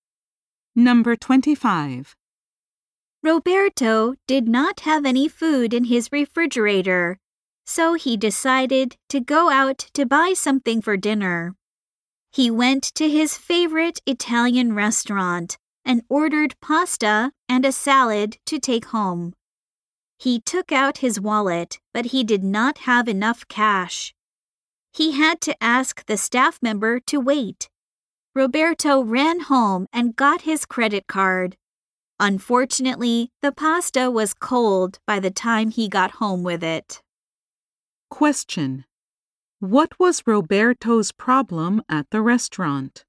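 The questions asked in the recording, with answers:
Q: What was Roberto's problem at the restaurant?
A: He did not have enough cash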